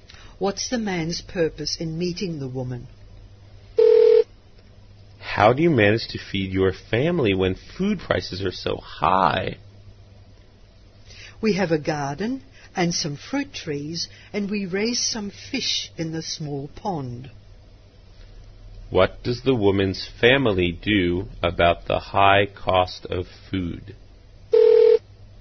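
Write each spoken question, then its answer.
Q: What does the woman's family do about the high cost of food?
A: They grow their own fruit and vegetables and raise fish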